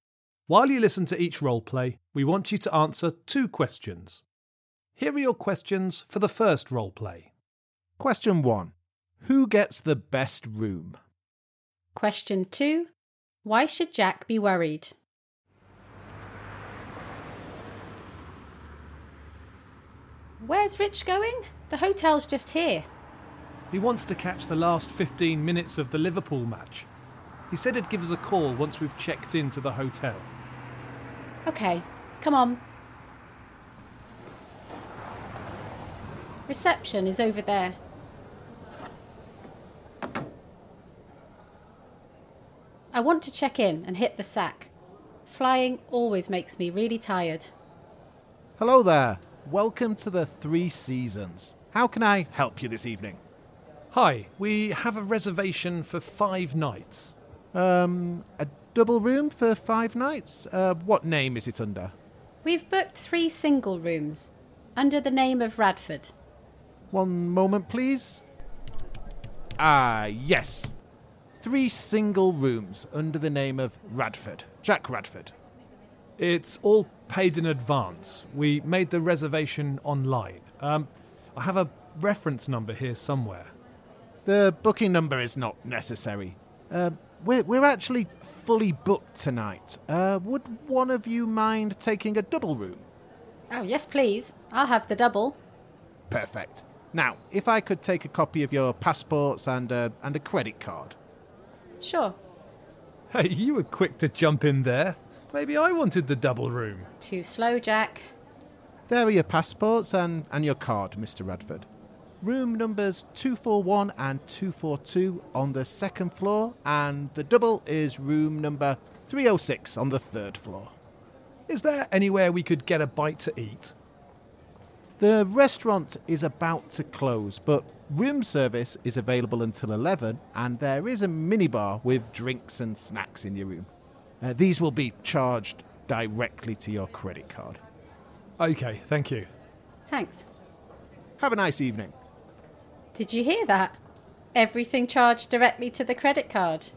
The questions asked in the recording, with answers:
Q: Why should Jack be worried?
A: He should be worried because anything Rich and I take out of the minibar gets put on his credit card.